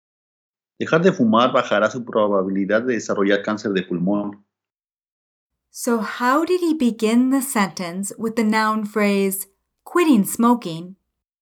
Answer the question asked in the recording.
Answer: Dejar de fumar.